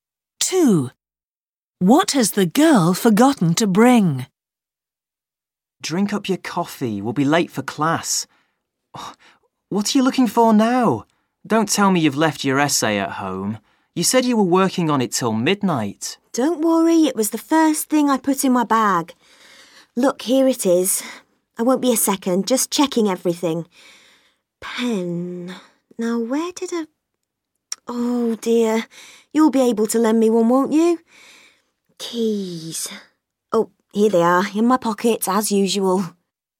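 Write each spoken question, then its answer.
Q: What has the girl forgotten to bring?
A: Her pen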